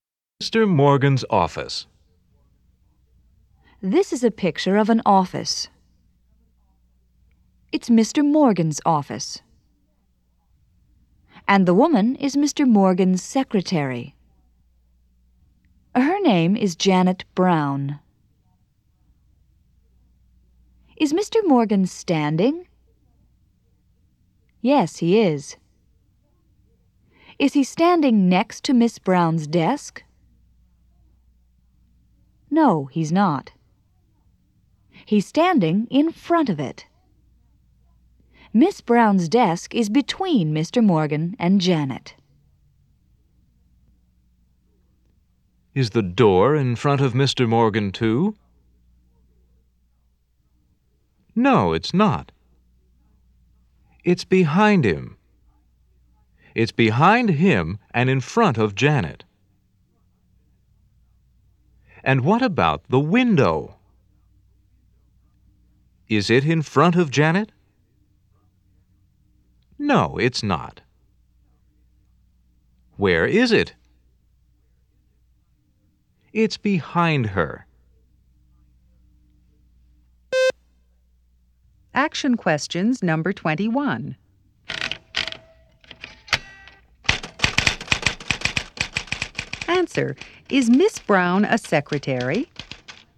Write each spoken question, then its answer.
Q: Is Miss Brown a secretary?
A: Yes, she is.